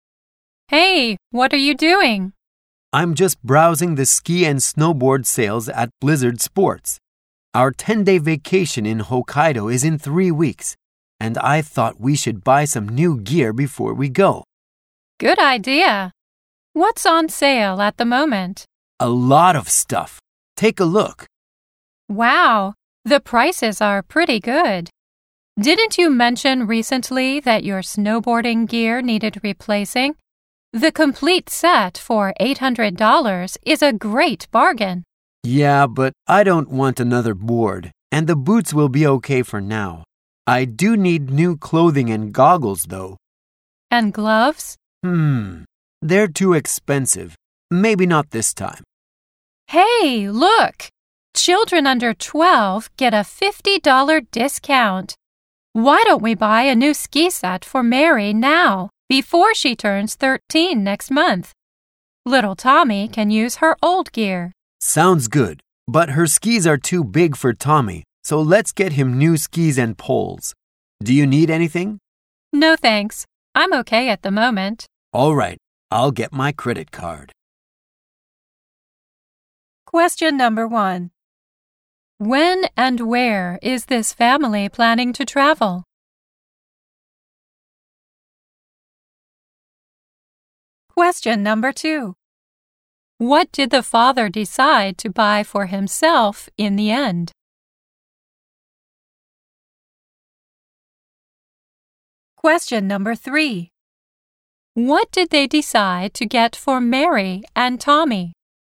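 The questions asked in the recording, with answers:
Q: When and where is this family planning to travel?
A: In three weeks, to Hokkaido, for a 10-day vacation.

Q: What did the father decide to buy for himself in the end?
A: New clothing and goggles.

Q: What did they decide to get for Mary and Tommy?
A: A new ski set for Mary, and new skis and poles for Tommy.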